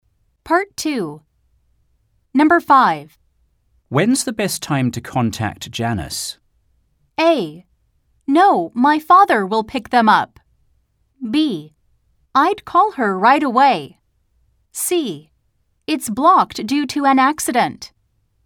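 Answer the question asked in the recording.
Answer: B: I'd call her right away.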